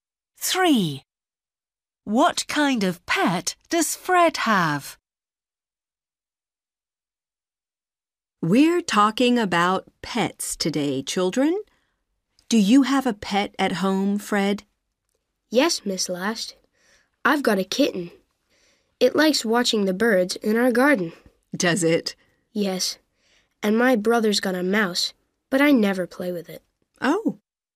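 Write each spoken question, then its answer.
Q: What kind of pet does Fred have?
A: A kitten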